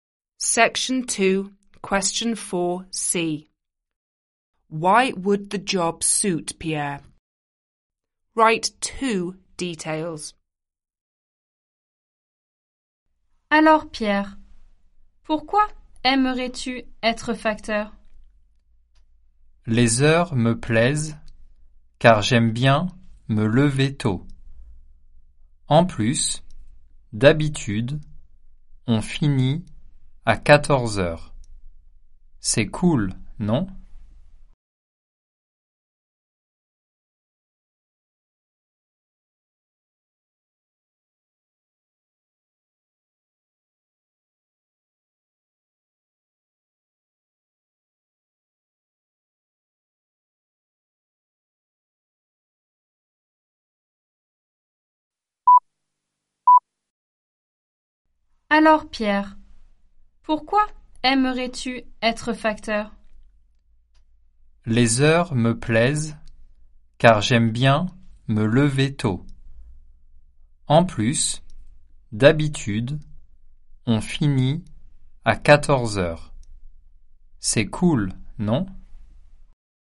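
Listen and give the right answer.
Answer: He likes getting up early and the work usually finishes at 2pm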